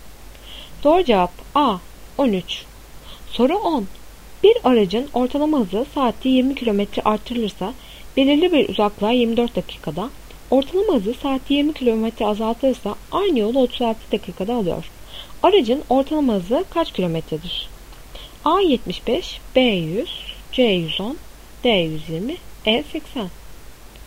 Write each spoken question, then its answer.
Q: Aracın ortalama hızı kaç kilometredir?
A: Doğru cevap B 100.